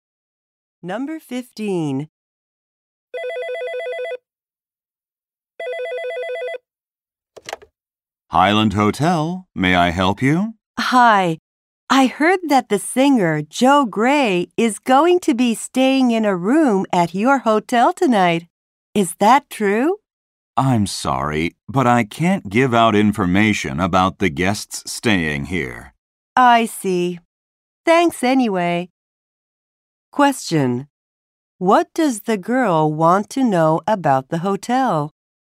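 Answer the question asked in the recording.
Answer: Whether the singer Joe Gray is staying there tonight.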